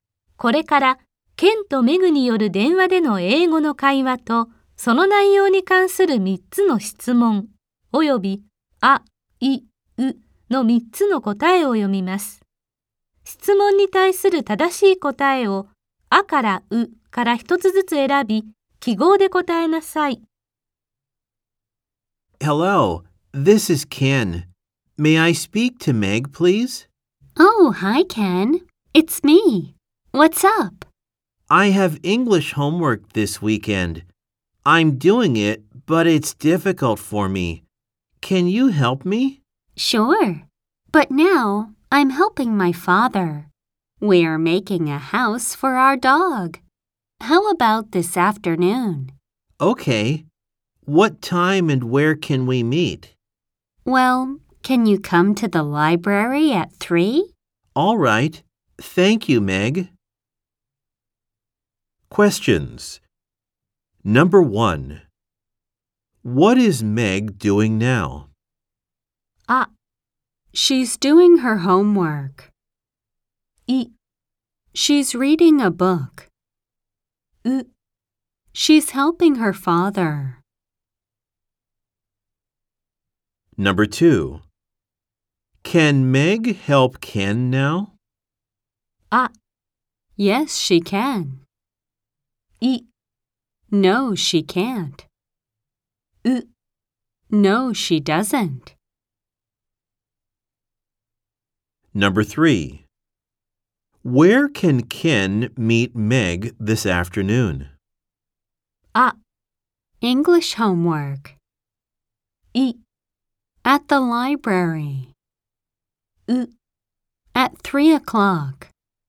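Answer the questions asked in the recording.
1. う: She's helping her father.
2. い: No, she can't.
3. い: At the library.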